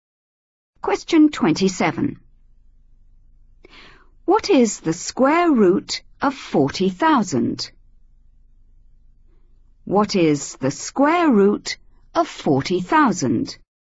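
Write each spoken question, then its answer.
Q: What is the square root of 40,000?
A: 200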